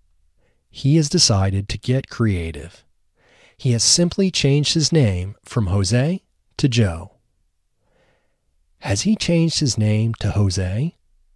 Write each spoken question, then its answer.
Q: Has he changed his name to Jose?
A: No, he hasn't changed his name to Jose.